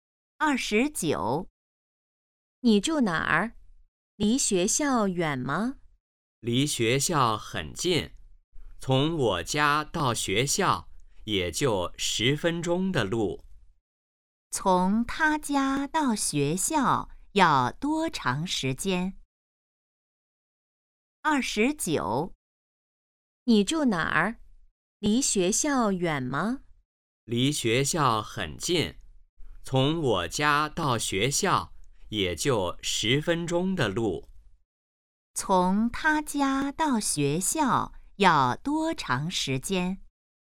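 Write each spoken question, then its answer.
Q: 从他家到学校要多长时间?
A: 10分钟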